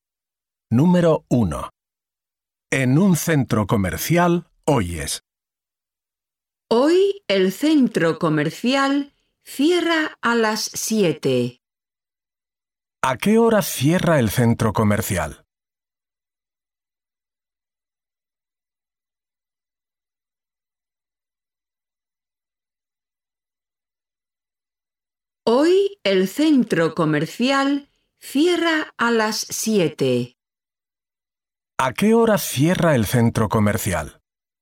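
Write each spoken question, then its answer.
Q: ¿A qué hora cierra el centro comercial?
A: A las 7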